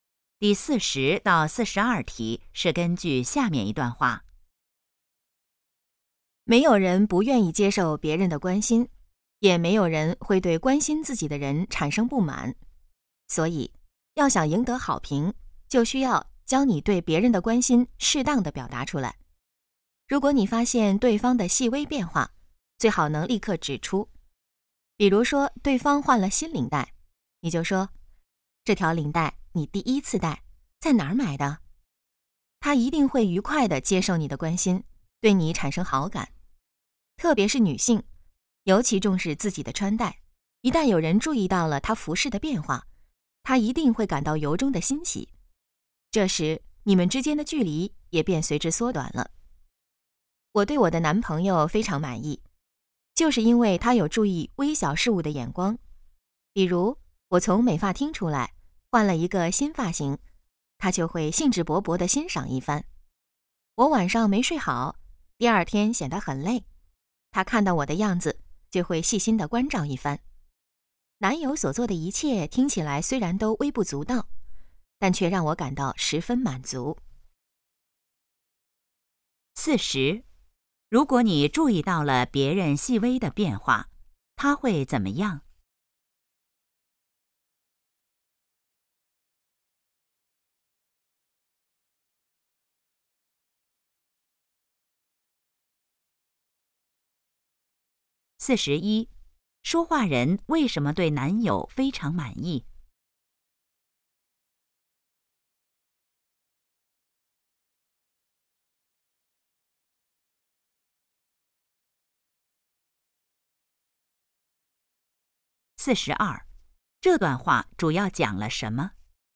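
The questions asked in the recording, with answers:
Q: 如果你注意到了别人细微的变化,他会怎么样?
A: 愉快地接受你的关心,对你产生好感

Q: 说话人为什么对男友非常满意?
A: 他能注意到微小的事物

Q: 这段话主要讲了什么?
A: 要适当表达对别人的关心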